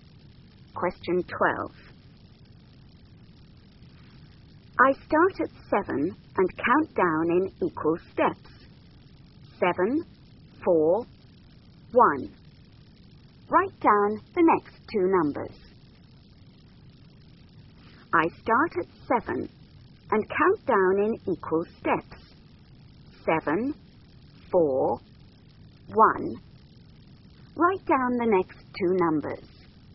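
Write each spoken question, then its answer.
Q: 7, 4, 1. Write down the next two numbers.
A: -2, -5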